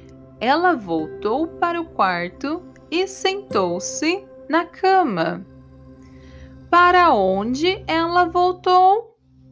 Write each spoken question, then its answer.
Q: Para onde ela voltou?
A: Ela voltou para o quarto.